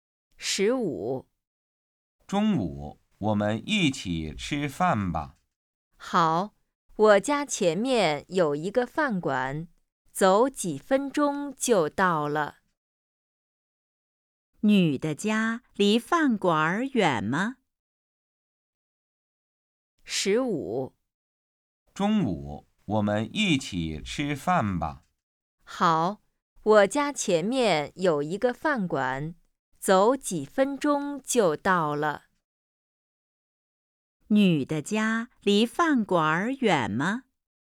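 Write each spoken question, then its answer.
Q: 女的家离饭馆远吗?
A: 不远,走几分钟就到了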